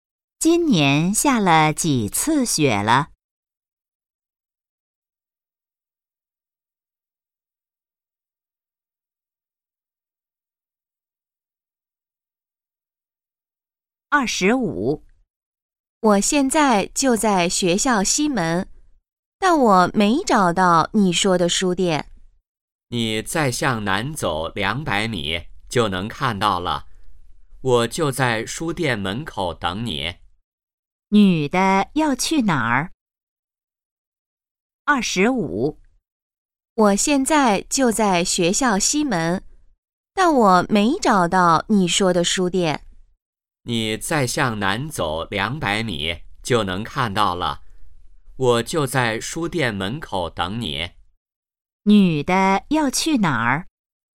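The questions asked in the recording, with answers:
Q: 女的要去哪儿?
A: 书店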